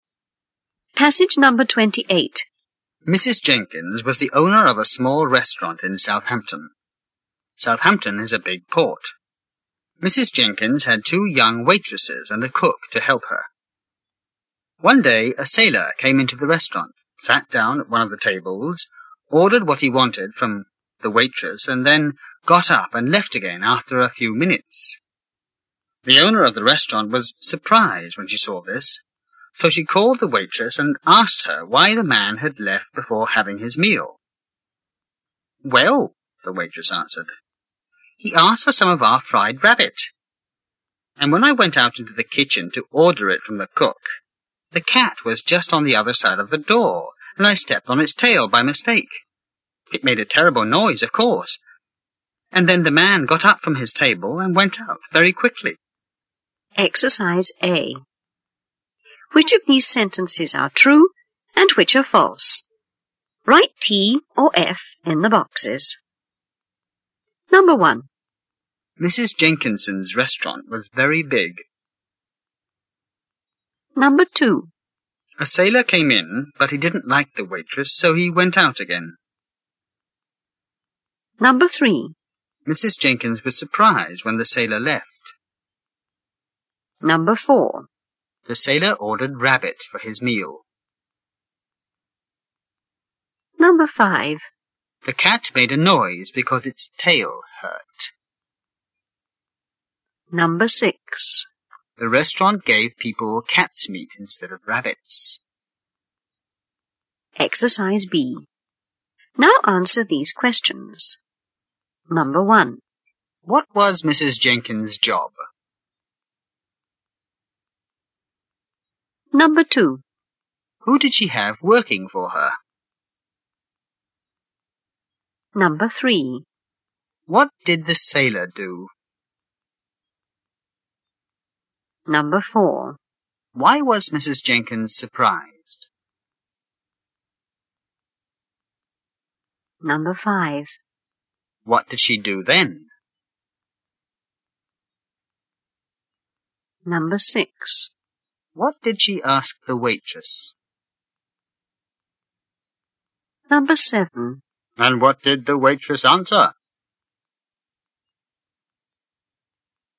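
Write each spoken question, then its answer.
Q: What was Mrs. Jenkins' job?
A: She owned a small restaurant in Southampton.

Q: Who did she have working for her?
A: Two young waitresses and a cook.

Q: What did the sailor do?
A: He came in, sat down, ordered, and left after a few minutes.

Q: Why was Mrs. Jenkins surprised?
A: Because the sailor left before having his meal.

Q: What did she do then?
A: She called the waitress.

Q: What did she ask the waitress?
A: Why the man had left before having his meal.

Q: And what did the waitress answer?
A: He ordered fried rabbit, she stepped on the cat's tail in the kitchen, it made a terrible noise, and he left.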